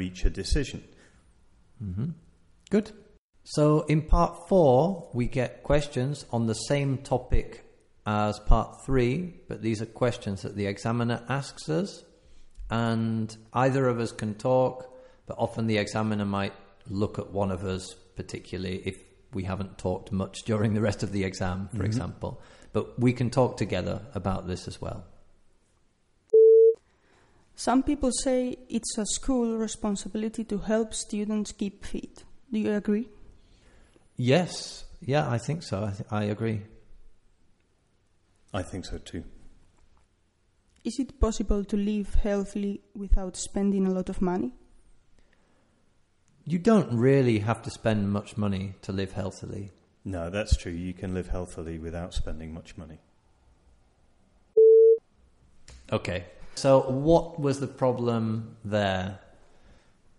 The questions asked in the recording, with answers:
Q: So, what was the problem there?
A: I'm sure you guessed it that the problem was that we gave very short answers.